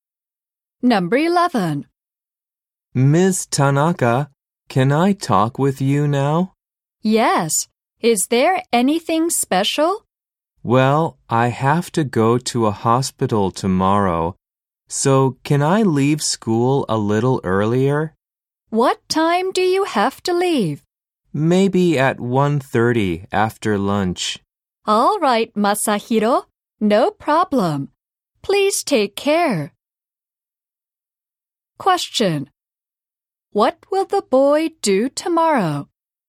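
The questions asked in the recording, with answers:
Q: What will the boy do tomorrow?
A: Go to a hospital (leaving school early at 1:30)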